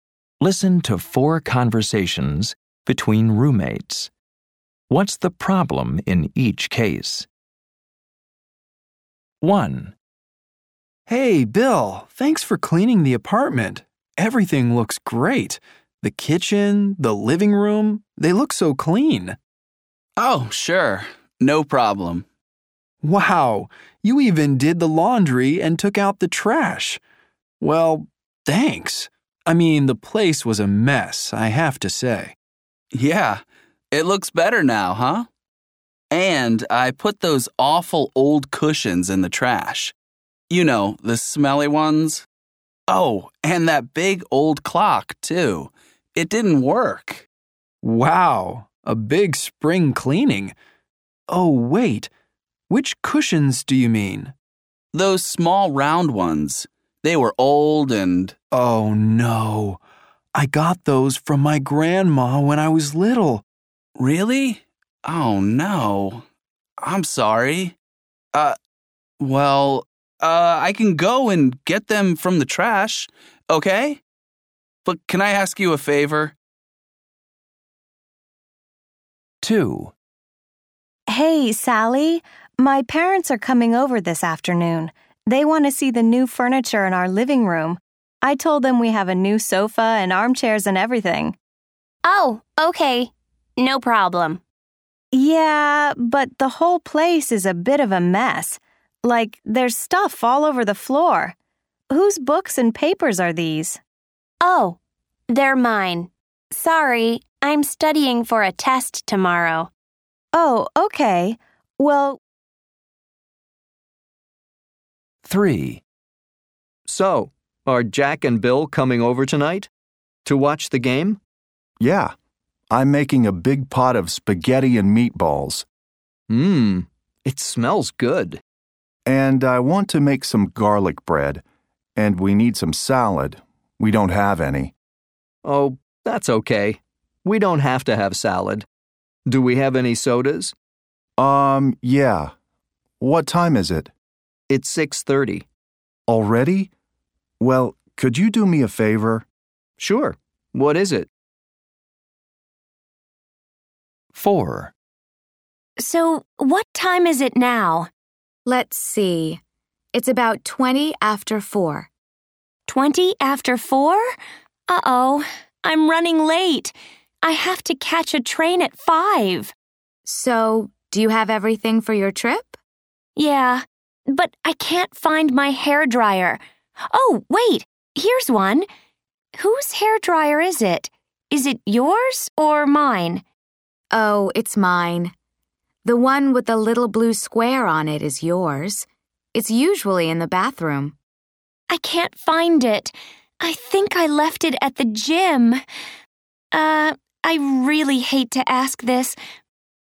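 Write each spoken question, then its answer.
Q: What's the problem in each case?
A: Bill threw away the cushions his roommate got from his grandma as a child.

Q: What's the problem in each case?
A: Her parents are coming, but Sally's books and papers are all over the floor.

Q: What's the problem in each case?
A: She is late for her train and can't find her hairdryer. She thinks she left it at the gym.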